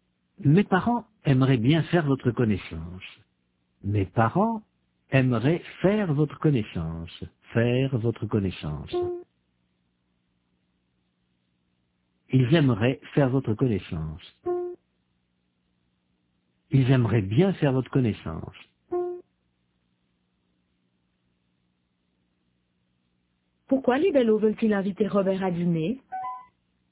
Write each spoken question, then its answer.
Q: Pourquoi les Bellots veulent-ils inviter Robert à dîner ?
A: Parce qu'ils aimeraient bien faire sa connaissance.